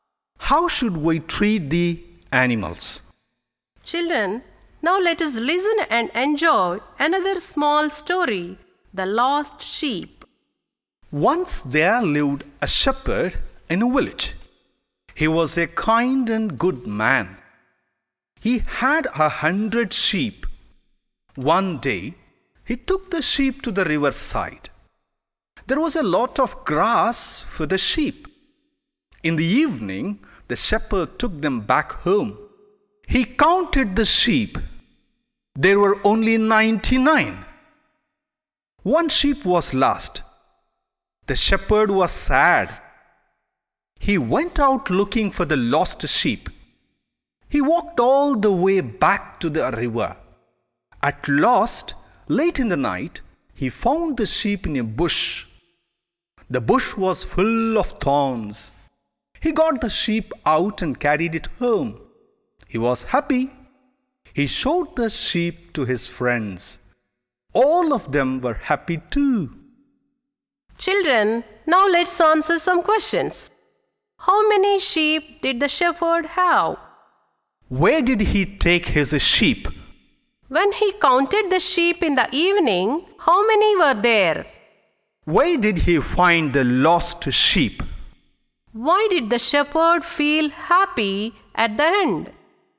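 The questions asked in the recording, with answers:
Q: How many sheep did the shepherd have?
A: 100

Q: Where did he take his sheep?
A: To the riverside

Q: When he counted the sheep in the evening, how many were there?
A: 99

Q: Where did he find the lost sheep?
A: In a thorny bush

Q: Why did the shepherd feel happy at the end?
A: He found the lost sheep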